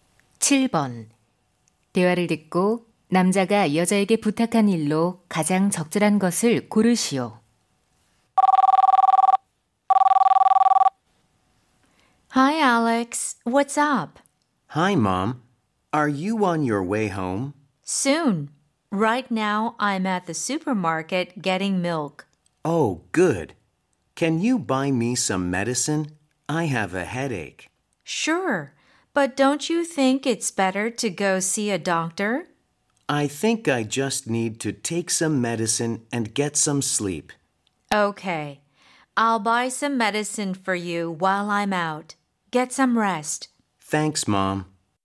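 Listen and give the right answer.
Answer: 약 사다 주기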